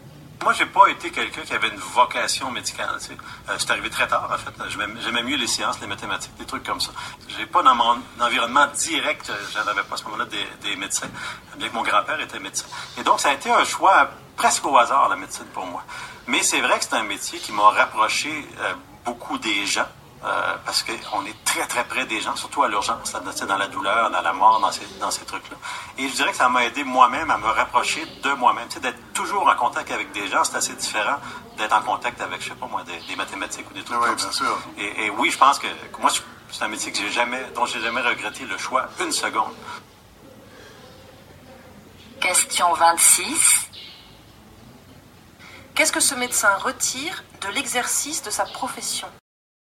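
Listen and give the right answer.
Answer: Il s'est rapproché des gens et de lui-même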